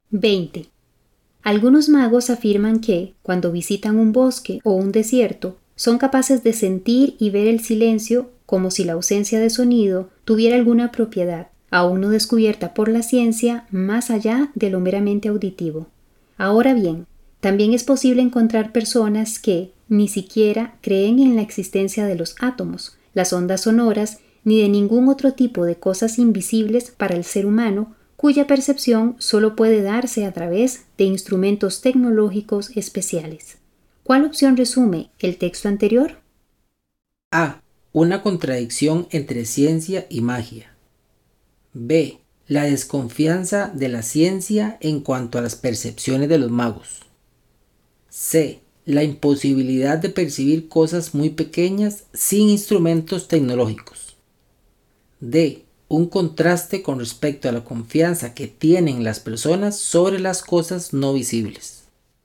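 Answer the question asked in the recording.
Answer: D: Un contraste con respecto a la confianza que tienen las personas sobre las cosas no visibles.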